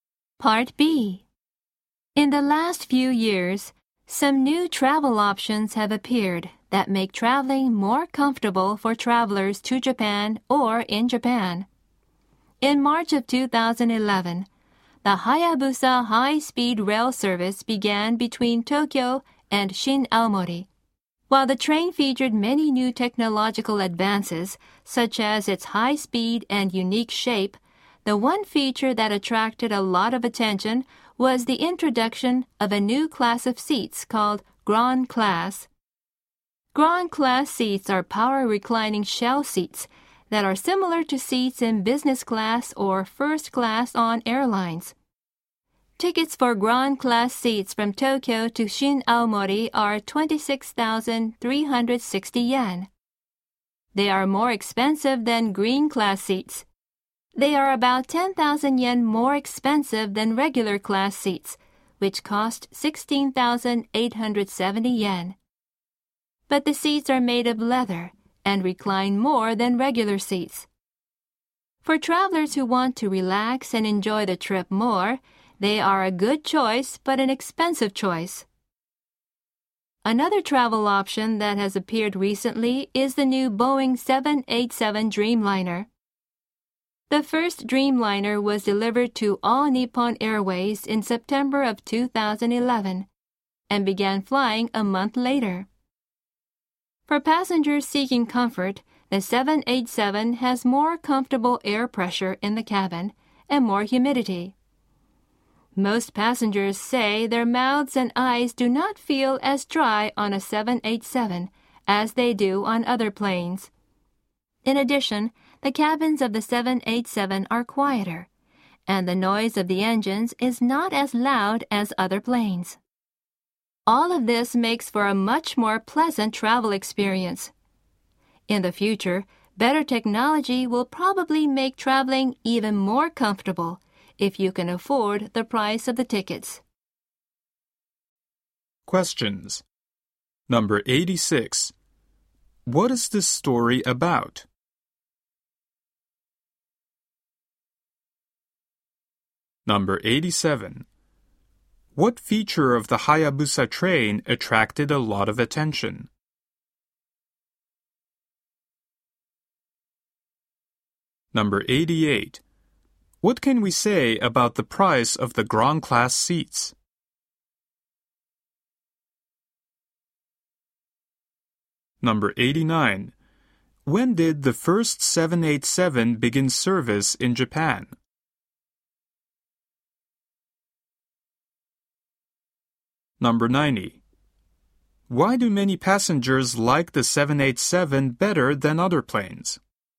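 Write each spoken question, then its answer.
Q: What is this story about?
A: New travel options that make traveling more comfortable

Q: What feature of the Hayabusa train attracted a lot of attention?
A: The new Grand Class seats

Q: What can we say about the price of the Grand Class seats?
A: Expensive: 26,360 yen, about 10,000 yen more than regular seats

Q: When did the first 787 begin service in Japan?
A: October 2011

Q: Why do many passengers like the 787 better than other planes?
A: Better air pressure and humidity, and a quieter cabin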